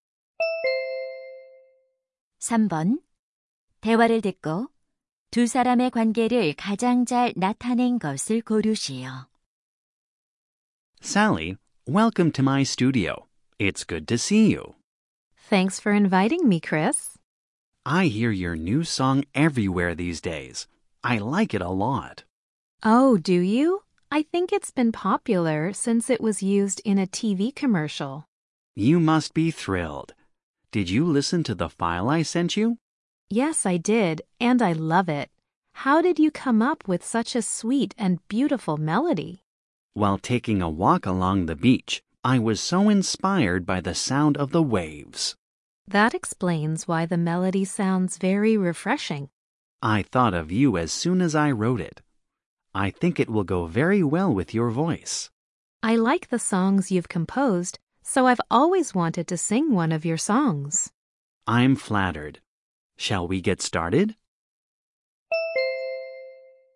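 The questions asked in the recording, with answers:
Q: 대화를 듣고 두 사람의 관계를 가장 잘 나타낸 것을 고르시오.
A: 작곡가 - 가수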